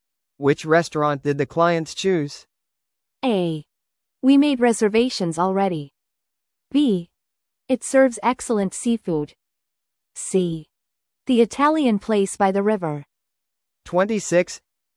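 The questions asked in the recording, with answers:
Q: Which restaurant did the clients choose?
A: C: The Italian place by the river.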